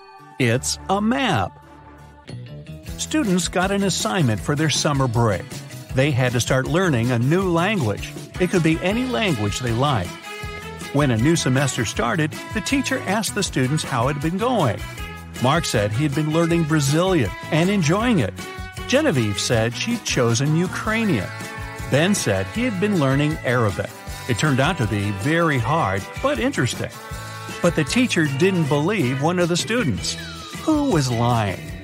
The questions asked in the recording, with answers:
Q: Who was lying?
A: She didn't believe Mark, who had said he had been studying Brazilian.